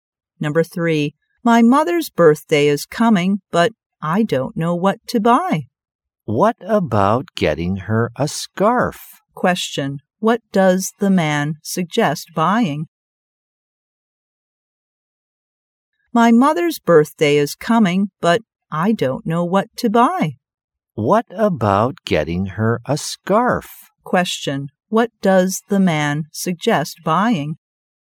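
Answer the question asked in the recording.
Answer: A scarf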